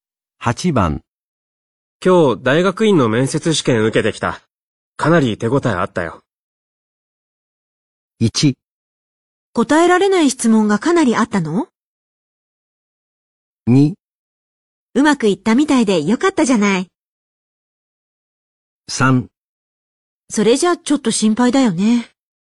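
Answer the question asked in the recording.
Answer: 2: うまくいったみたいでよかったじゃない。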